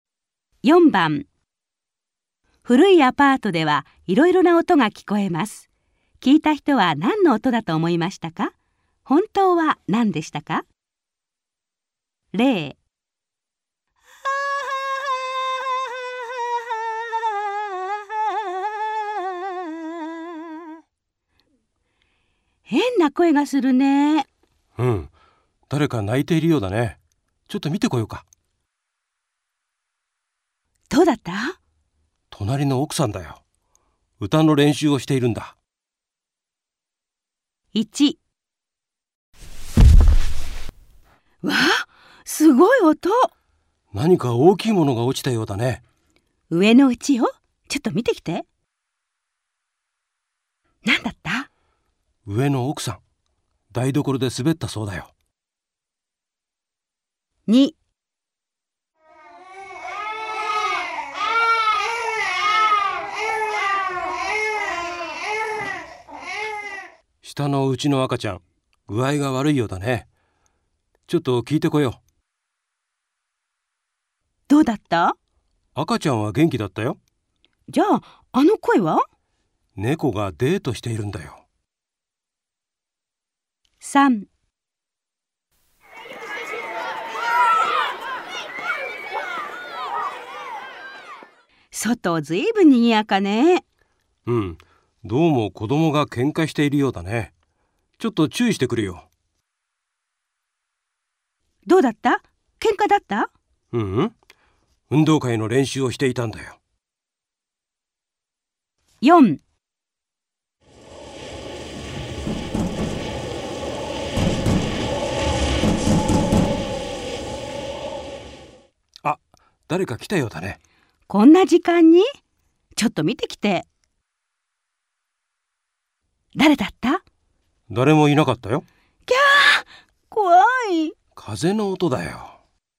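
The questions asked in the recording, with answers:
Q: 聞いた人は何の音だと思いましたか?本当は何でしたか?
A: 何か大きいものが落ちた音だと思った。本当は上の奥さんが台所で滑った音。

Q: 聞いた人は何の音だと思いましたか?本当は何でしたか?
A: 下のうちの赤ちゃんの具合が悪いと思った。本当は猫の声(デート)。

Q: 聞いた人は何の音だと思いましたか?本当は何でしたか?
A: 子供が喧嘩していると思った。本当は運動会の練習。

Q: 聞いた人は何の音だと思いましたか?本当は何でしたか?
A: 誰か来たと思った。本当は風の音。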